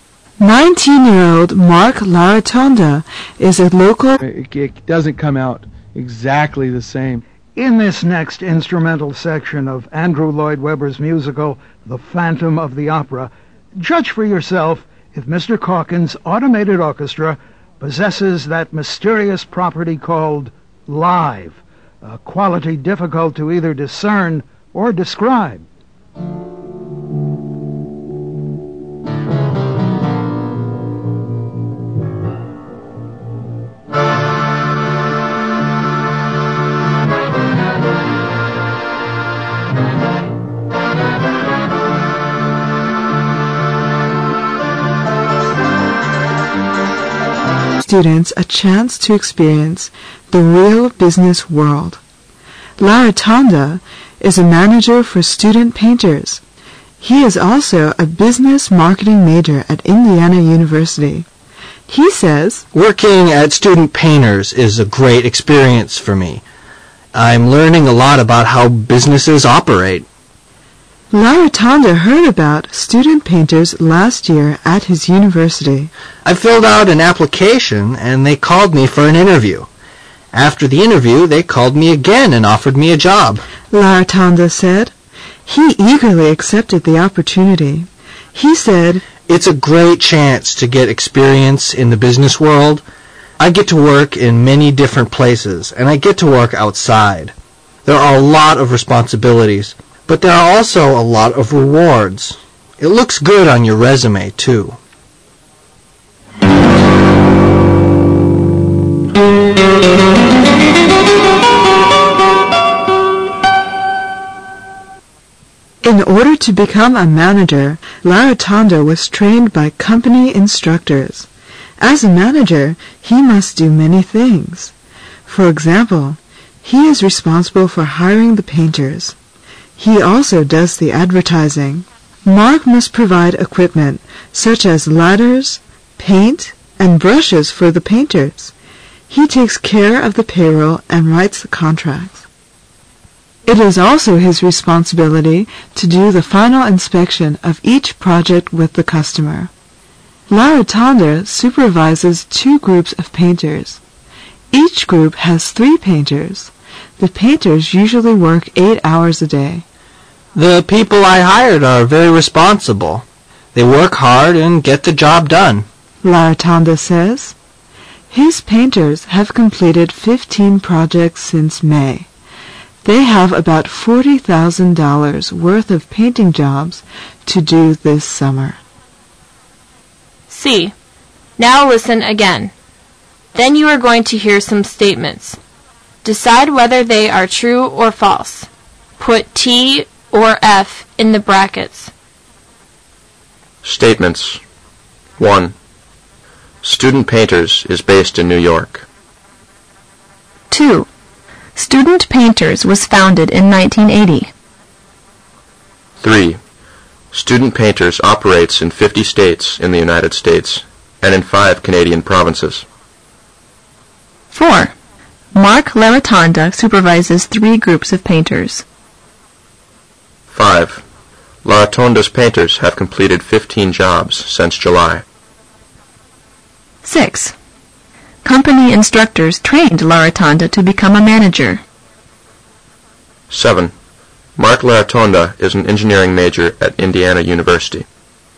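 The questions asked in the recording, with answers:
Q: Mark LaRotonda supervises 3 groups of painters.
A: F (he supervises 2 groups)

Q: LaRotonda's painters have completed 15 jobs since July.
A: F (since May)

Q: Mark LaRotonda is an engineering major at Indiana University.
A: F (business marketing major)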